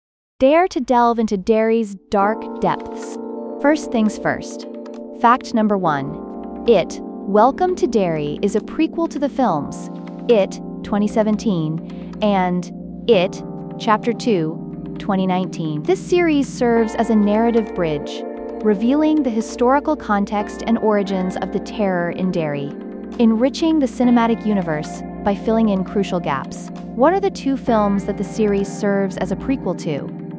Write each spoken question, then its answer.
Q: What are the 2 films that the series serves as a prequel to?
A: It, 2017, and It, Chapter 2, 2019.